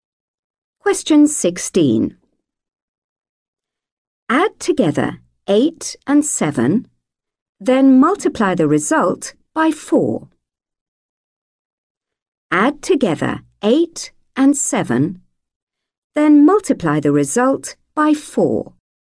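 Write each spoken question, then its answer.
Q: Add together 8 and 7, then multiply the result by 4.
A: 60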